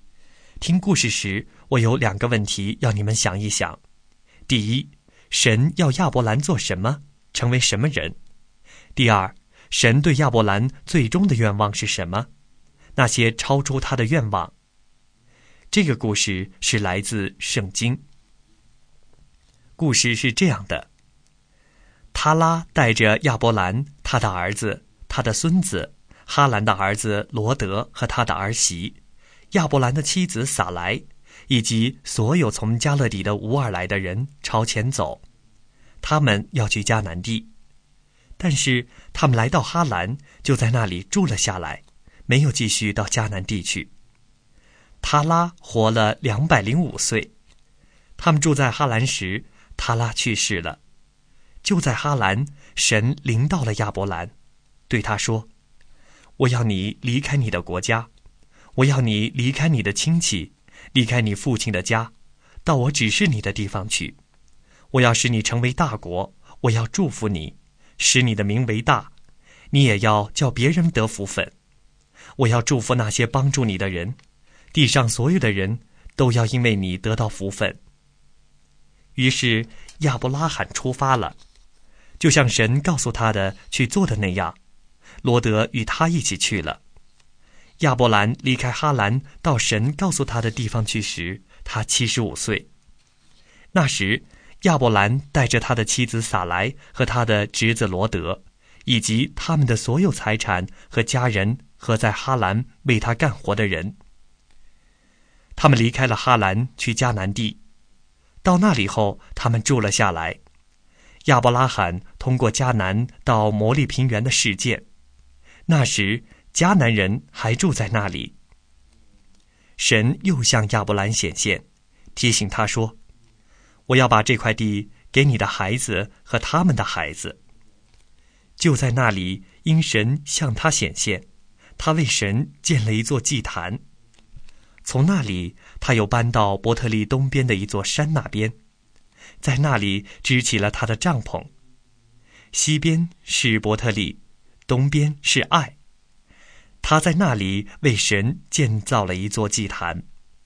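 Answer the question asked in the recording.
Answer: 离开他的国家、亲戚和父亲的家,到神指示的地方去;神要使他成为大国,并叫别人得福。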